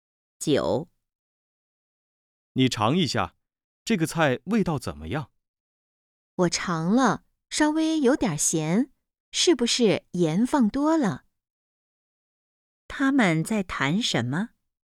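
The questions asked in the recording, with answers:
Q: 他们在谈什么?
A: 菜的味道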